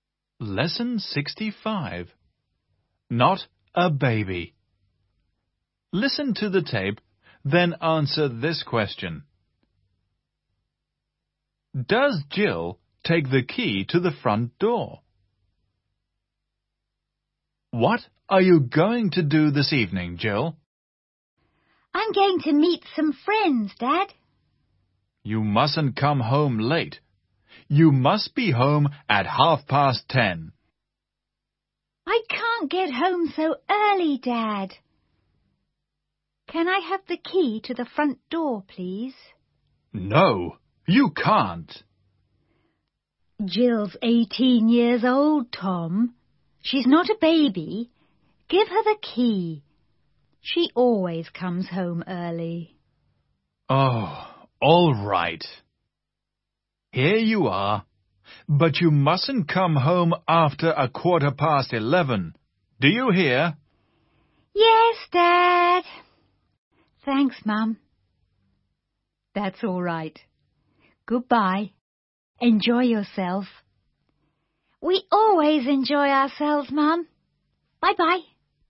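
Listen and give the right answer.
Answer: Yes, she does.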